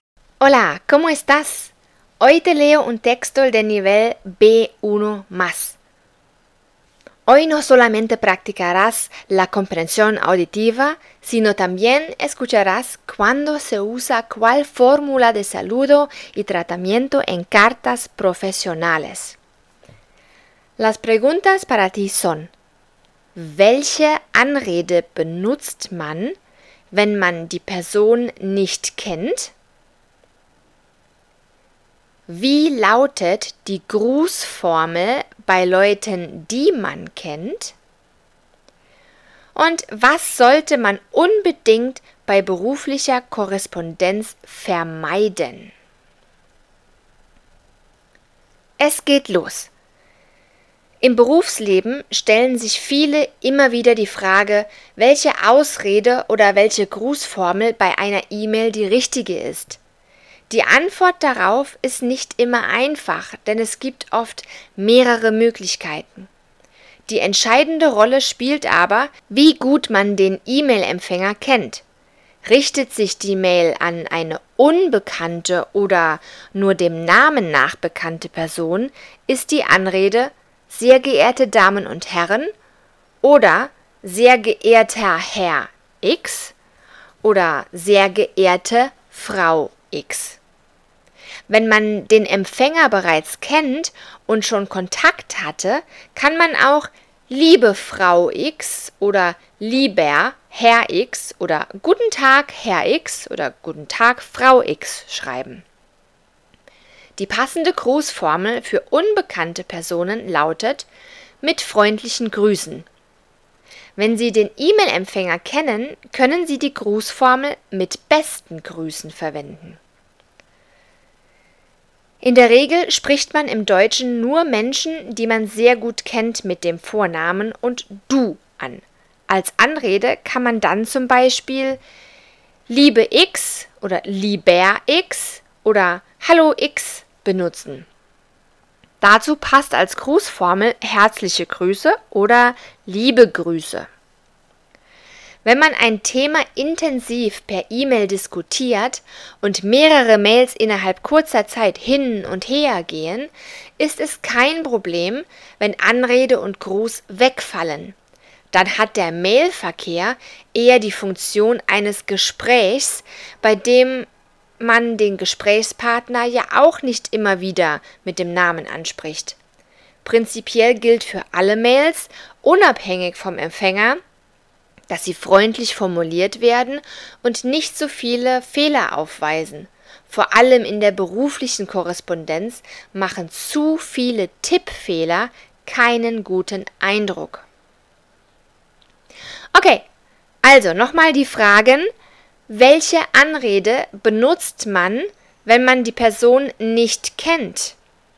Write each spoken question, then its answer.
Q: Welche Anrede benutzt man, wenn man die Person nicht kennt?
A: Sehr geehrte Damen und Herren, oder wenn man den Namen weiß, sehr geehrter Herr X oder sehr geehrte Frau X.

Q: Und was sollte man unbedingt bei beruflicher Korrespondenz vermeiden?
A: viele Tippfehler.